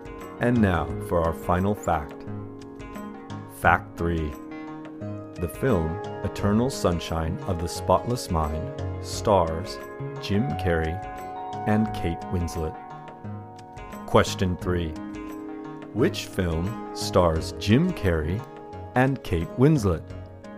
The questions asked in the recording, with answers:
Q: Which film stars Jim Carrey and Kate Winslet?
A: The film Eternal Sunshine of the Spotless Mind stars Jim Carrey and Kate Winslet.